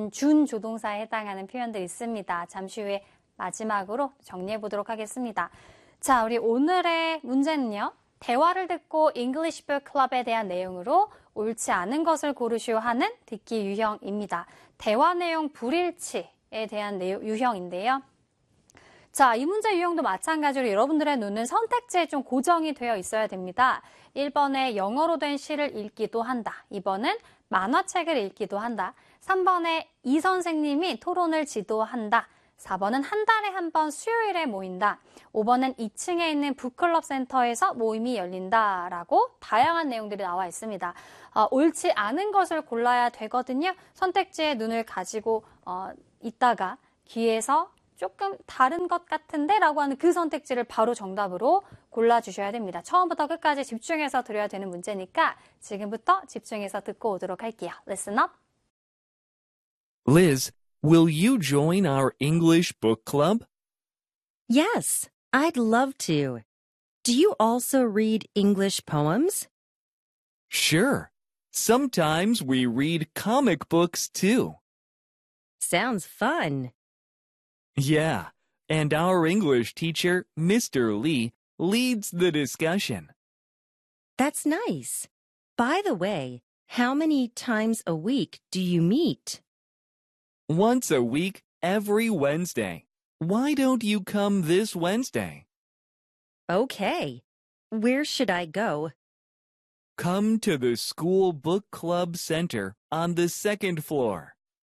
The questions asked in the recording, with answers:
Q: 대화를 듣고 English Book Club에 대한 내용으로 옳지 않은 것을 고르시오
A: 옳지 않은 것은 4번, 한 달에 한 번이 아니라 일주일에 한 번 수요일이었다.